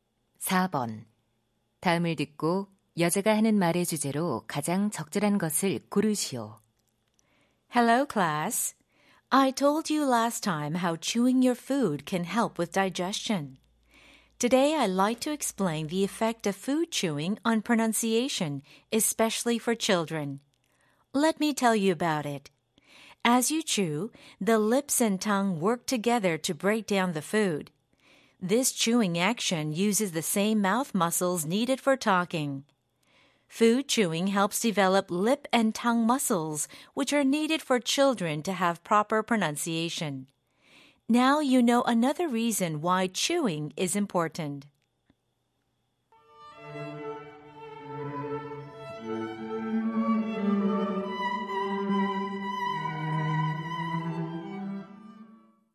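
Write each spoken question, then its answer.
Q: 다음을 듣고 여자가 하는 말의 주제로 가장 적절한 것을 고르시오.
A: 음식 씹기가 아이들의 발음에 미치는 영향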